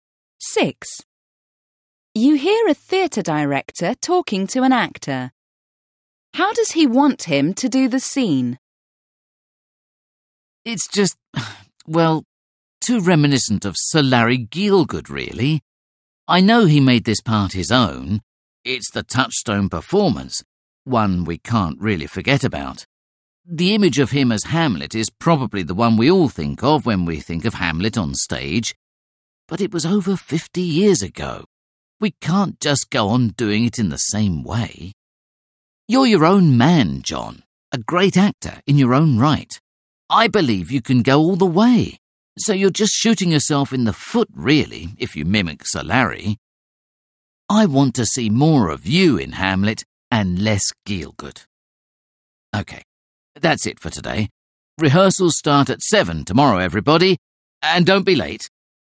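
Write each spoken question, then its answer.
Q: How does he want him to do the scene?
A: In his own way, not copying Gielgud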